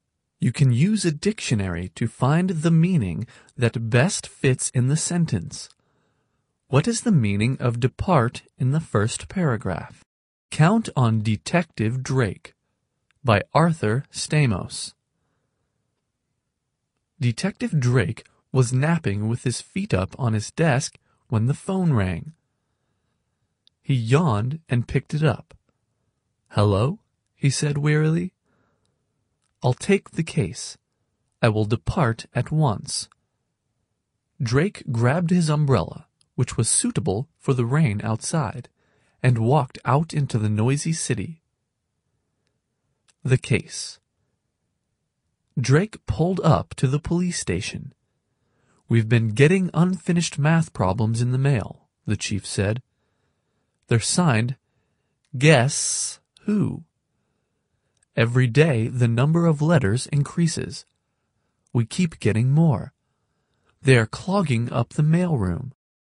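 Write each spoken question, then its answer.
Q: What is the meaning of depart in the first paragraph?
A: to leave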